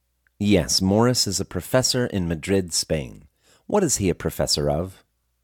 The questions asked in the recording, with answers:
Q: What is he a professor of?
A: He is a professor of animal physiology.